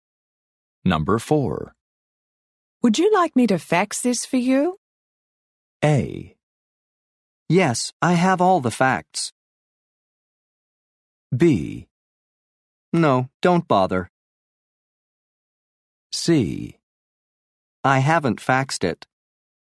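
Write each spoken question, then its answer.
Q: Would you like me to fax this for you?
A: B: No, don't bother.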